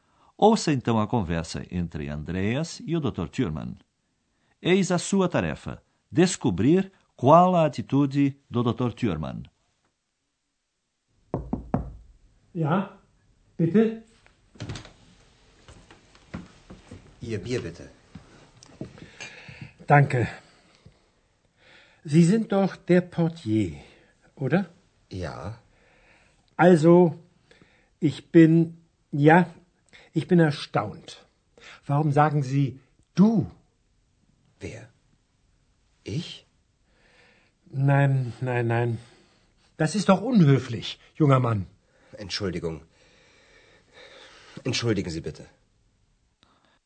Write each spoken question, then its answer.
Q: Eis a sua tarefa: descobrir qual a atitude do Dr. Thurman.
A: Bem, não houve escândalo. Ele se comportou de forma objetiva, você concorda?